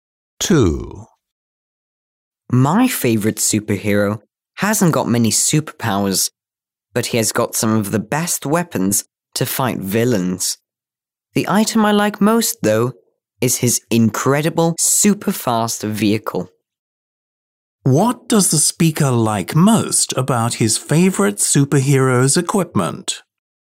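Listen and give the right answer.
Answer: His super-fast vehicle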